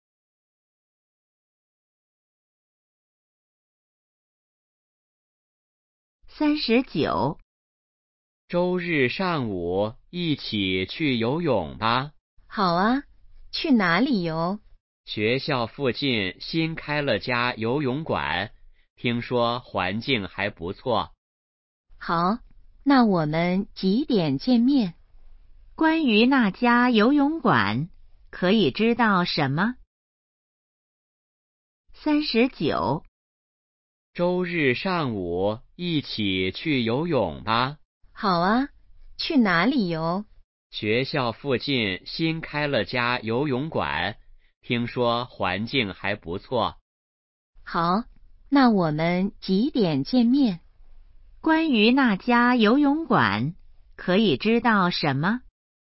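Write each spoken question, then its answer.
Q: 关于那家游泳馆,可以知道什么?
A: 新开的,在学校附近,环境不错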